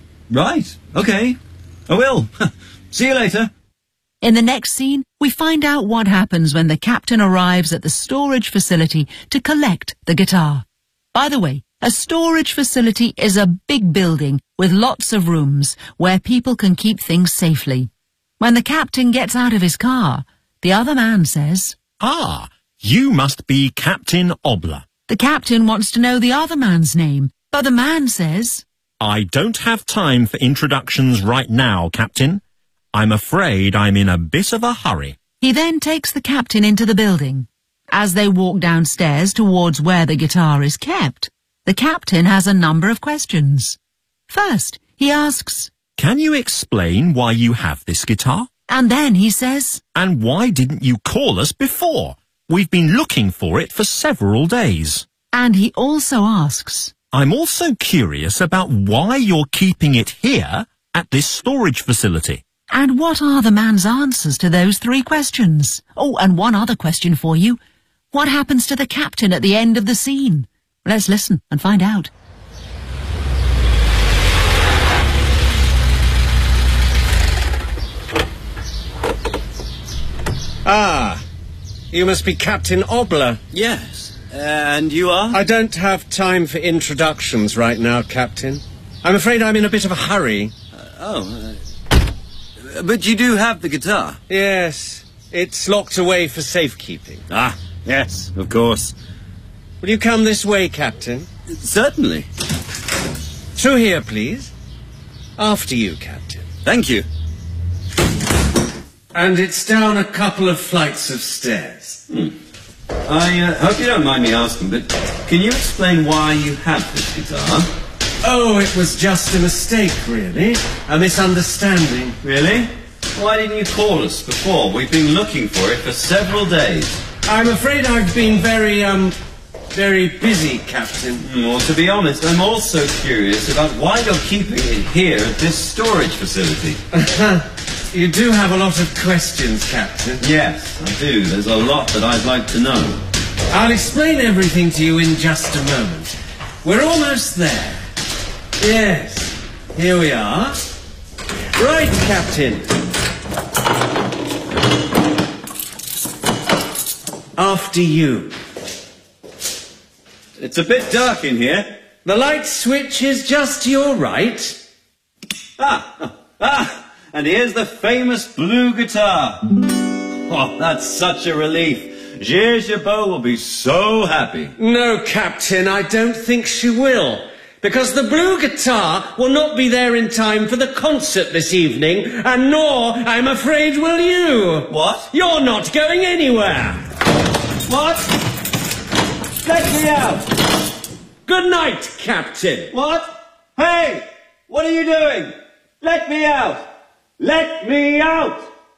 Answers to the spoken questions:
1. When the captain asked why he had the guitar, he said,
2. And he slams the door and locks the captain inside.